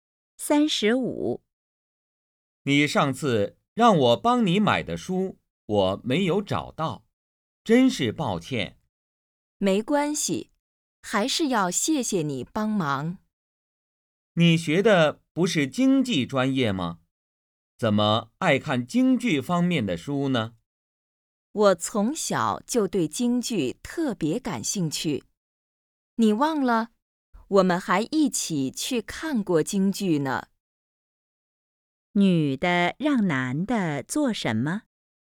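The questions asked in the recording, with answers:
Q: 女的让男的做什么?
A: 买京剧方面的书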